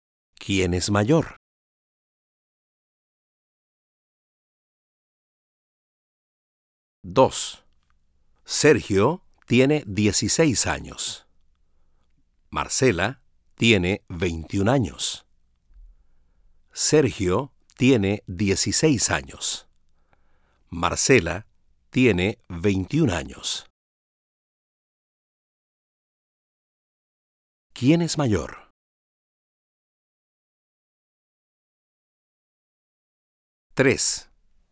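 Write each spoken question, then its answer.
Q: ¿Quién es mayor?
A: Marcela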